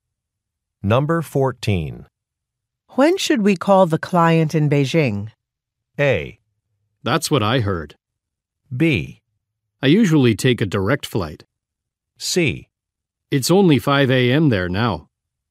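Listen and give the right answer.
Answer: C: It's only 5 a.m. there now.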